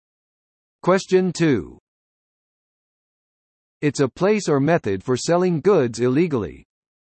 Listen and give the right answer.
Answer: The black market.